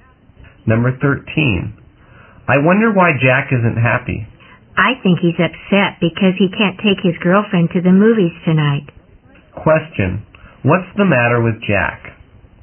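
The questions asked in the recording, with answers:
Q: What's the matter with Jack?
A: He can't take his girlfriend to the movies tonight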